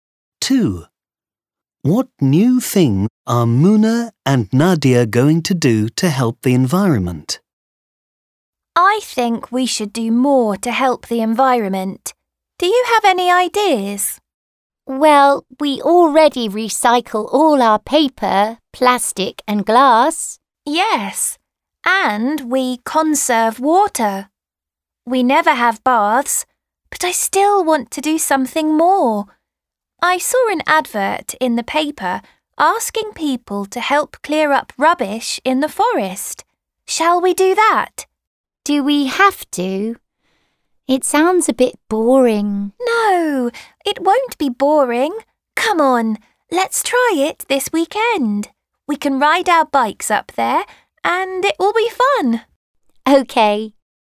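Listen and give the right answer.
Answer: Help clear up rubbish in the forest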